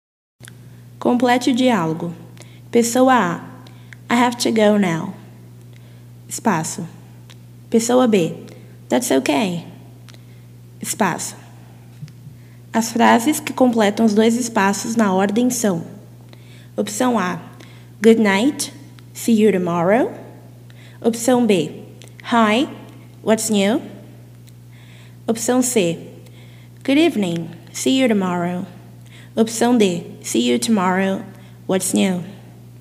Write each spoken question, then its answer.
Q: As frases que completam os dois espaços na ordem são:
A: Se você respondeu opção A, você acertou.